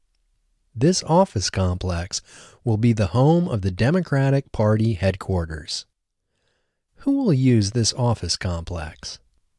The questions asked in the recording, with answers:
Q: Who will use this office complex?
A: The Democratic Party will use this office complex.